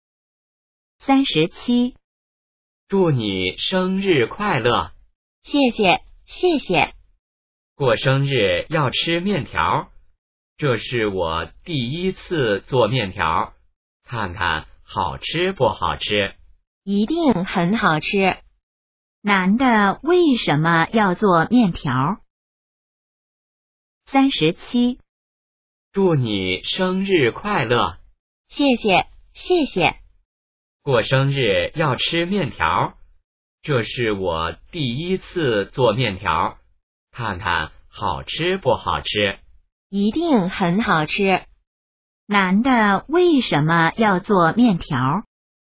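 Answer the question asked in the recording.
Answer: 因为女的过生日(过生日要吃面条)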